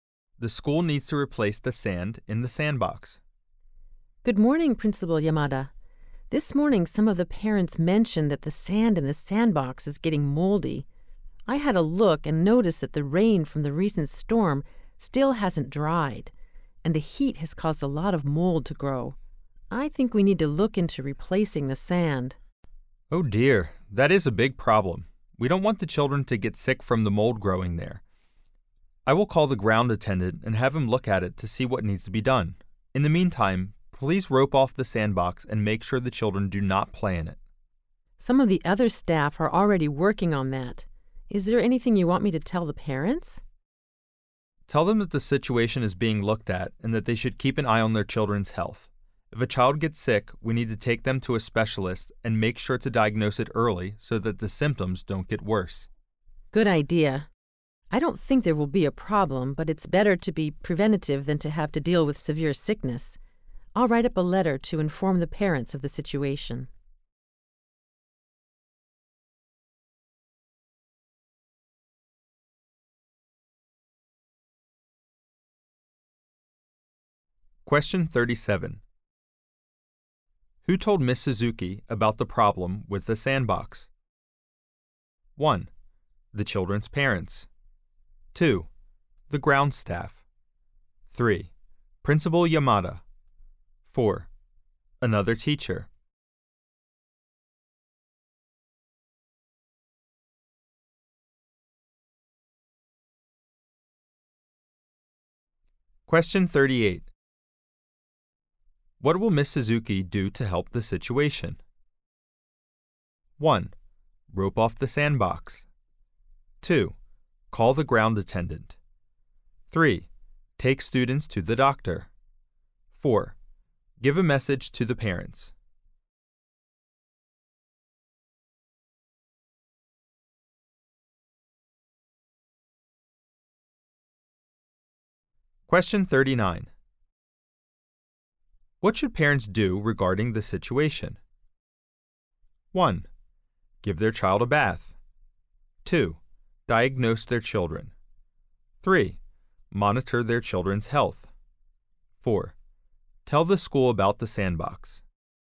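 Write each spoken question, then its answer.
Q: Who told Ms. Suzuki about the problem with the sandbox?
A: 1: The children's parents.

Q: What will Ms. Suzuki do to help the situation?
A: 4: Give a message to the parents.

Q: What should parents do regarding the situation?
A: 3: Monitor their children's health.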